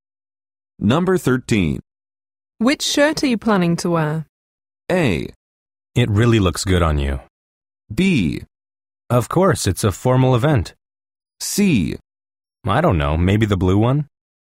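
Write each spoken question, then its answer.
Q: Which shirt are you planning to wear?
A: C: I don't know, maybe the blue one?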